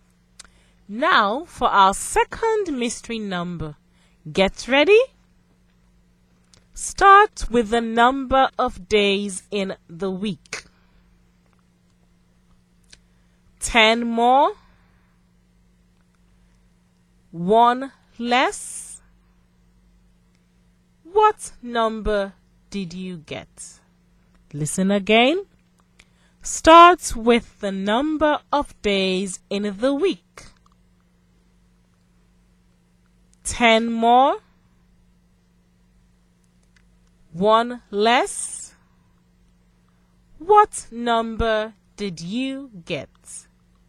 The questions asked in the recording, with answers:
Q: What number did you get?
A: I think the mystery number is 16.